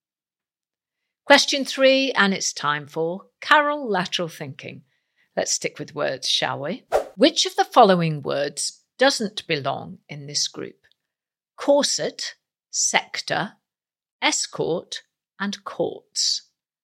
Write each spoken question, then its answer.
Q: Which of the following words doesn't belong in this group?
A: And the odd one out is courts.